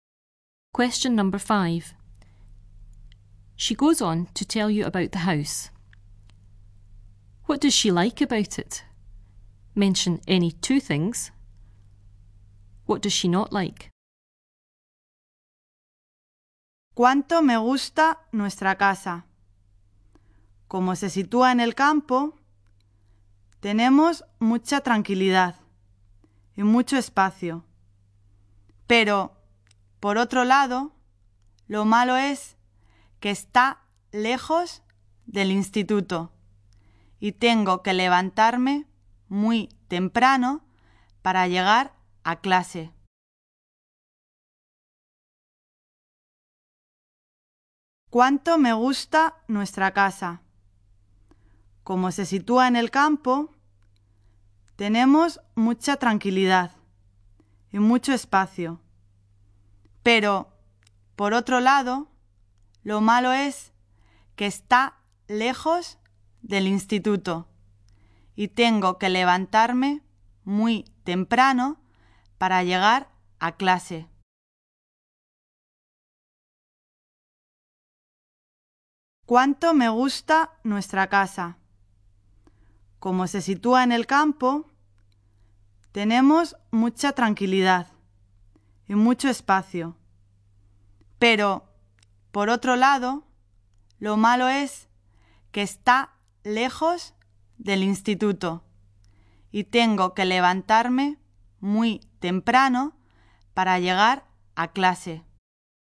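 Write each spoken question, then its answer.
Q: What does she like about it?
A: It is in the country, very quiet, lots of space

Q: What does she not like?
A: It is far from school, so she has to get up very early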